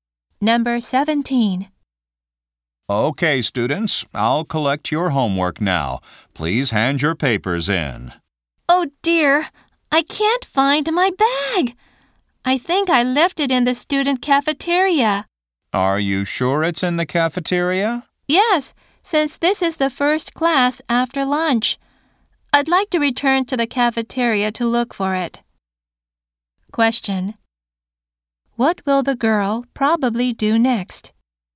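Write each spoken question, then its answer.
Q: What will the girl probably do next?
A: Go back to the cafeteria to look for her bag.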